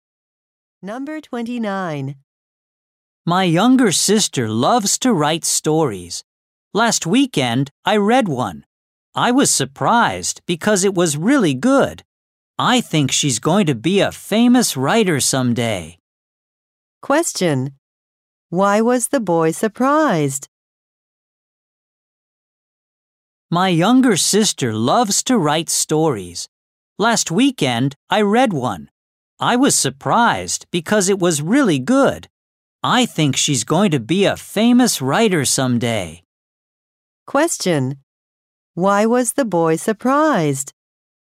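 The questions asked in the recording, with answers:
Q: Why was the boy surprised?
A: His sister's story was really good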